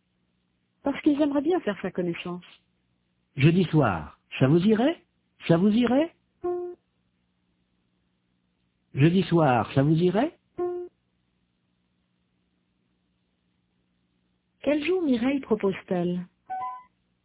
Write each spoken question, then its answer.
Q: Quel jour Mireille propose-t-elle ?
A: Jeudi.